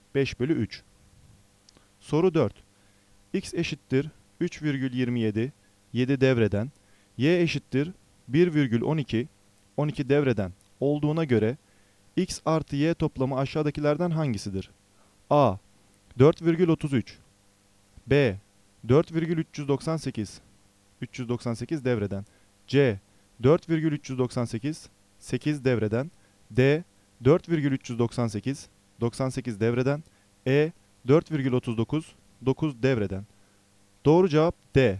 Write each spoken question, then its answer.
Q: X eşittir 3,27, 7 devreden, Y eşittir 1,12, 12 devreden olduğuna göre X artı Y toplamı aşağıdakilerden hangisidir?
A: Doğru cevap D.